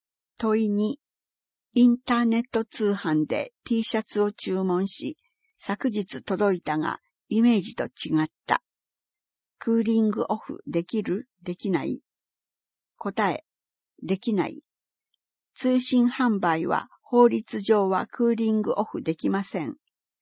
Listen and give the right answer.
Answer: 答え、できない。